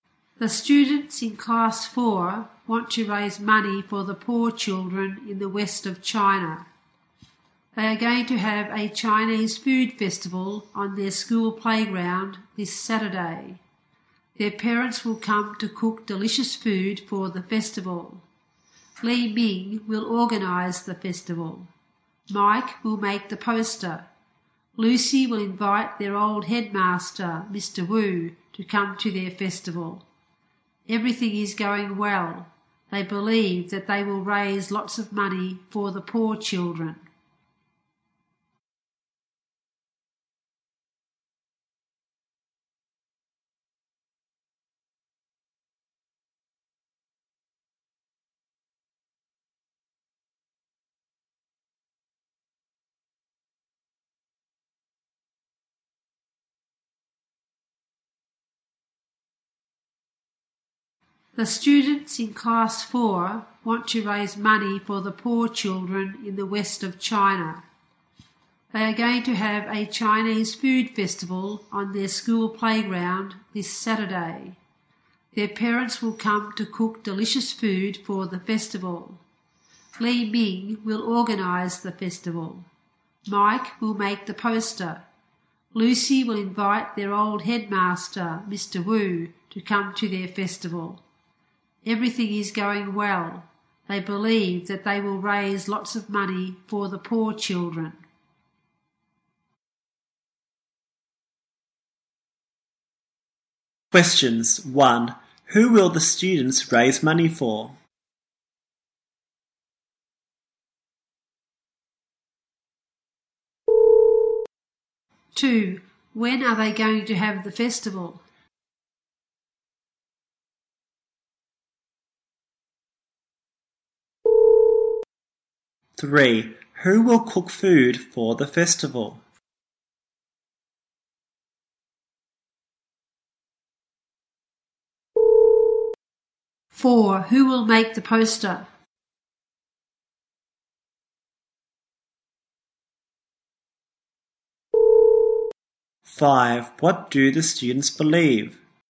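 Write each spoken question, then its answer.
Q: Who will the students raise money for?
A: The poor children in the west of China.

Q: When are they going to have the festival?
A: This Saturday.

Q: Who will cook food for the festival?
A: Their parents.

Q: Who will make the poster?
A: Mike.

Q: What do the students believe?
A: They will raise lots of money for the poor children.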